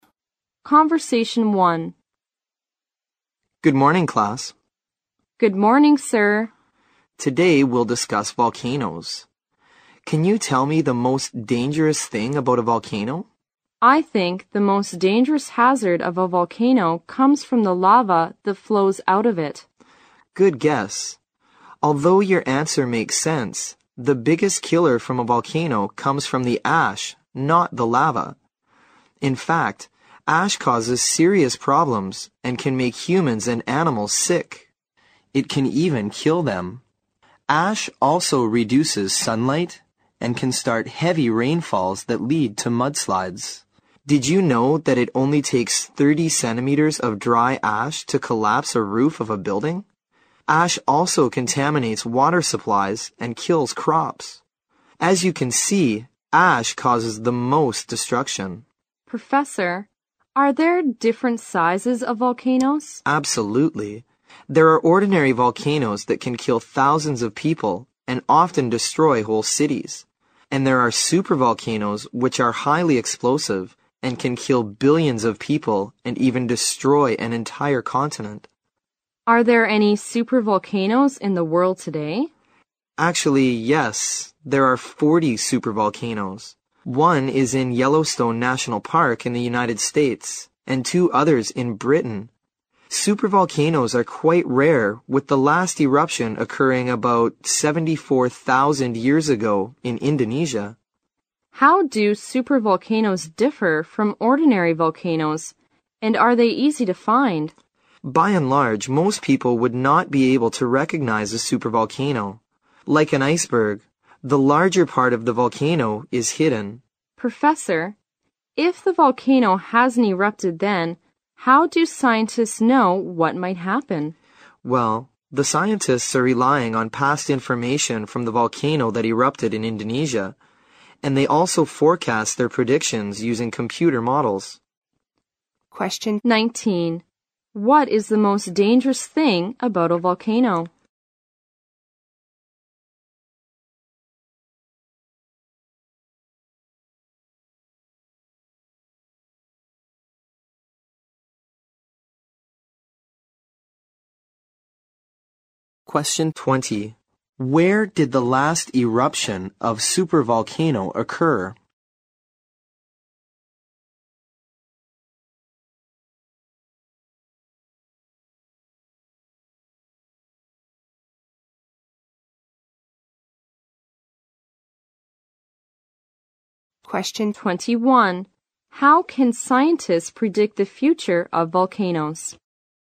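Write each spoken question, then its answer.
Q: What is the most dangerous thing about a volcano?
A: The ash

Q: Where did the last eruption of supervolcano occur?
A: In Indonesia

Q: How can scientists predict the future of volcanoes?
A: Using past information from the Indonesian eruption and computer models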